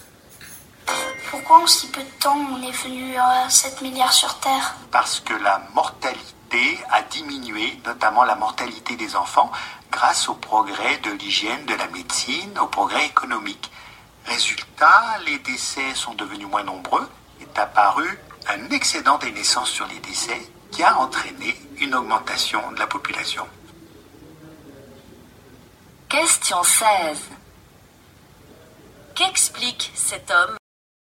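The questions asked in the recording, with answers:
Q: Qu'explique cet homme?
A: Pourquoi la population mondiale a augmenté : la baisse de la mortalité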